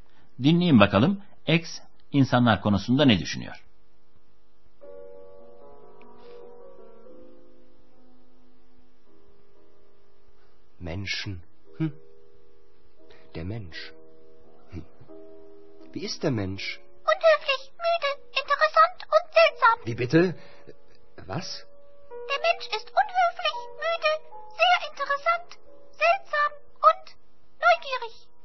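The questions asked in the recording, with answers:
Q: Dinleyin bakalım X insanlar konusunda ne düşünüyor?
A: İnsanlar kaba, yorgun, ilginç, tuhaf ve meraklı (unhöflich, müde, interessant, seltsam, neugierig)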